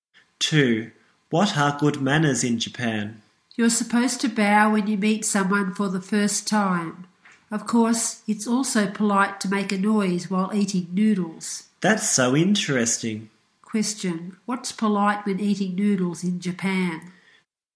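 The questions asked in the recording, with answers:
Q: Question, what's polite when eating noodles in Japan?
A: Making a noise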